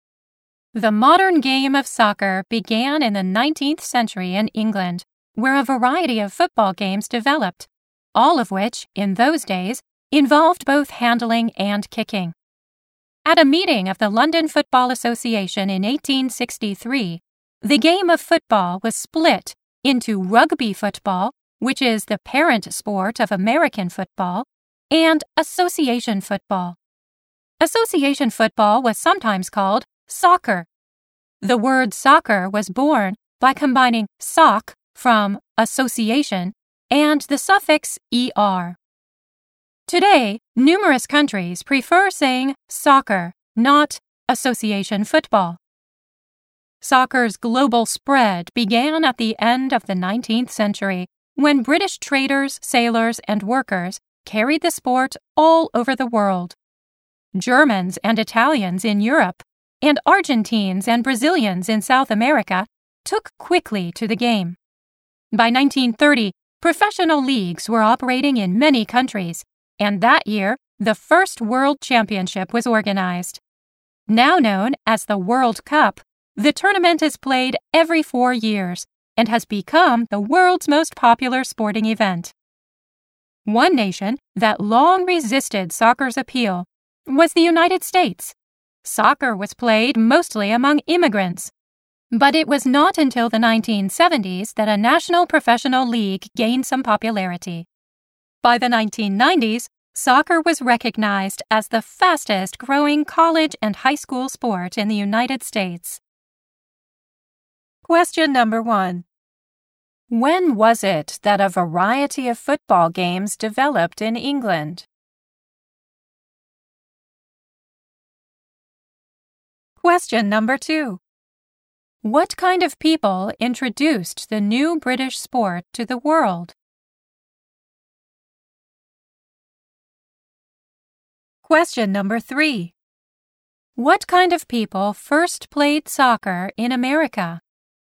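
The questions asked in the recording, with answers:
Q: When was it that a variety of football games developed in England?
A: In the 19th century

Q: What kind of people introduced the new British sport to the world?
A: British traders, sailors, and workers

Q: What kind of people first played soccer in America?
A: Immigrants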